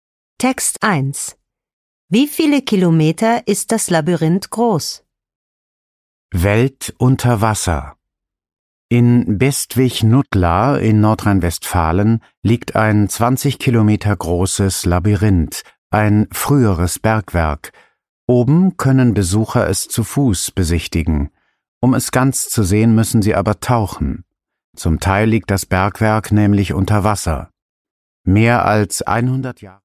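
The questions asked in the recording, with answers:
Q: Wie viele Kilometer ist das Labyrinth groß?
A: 20 Kilometer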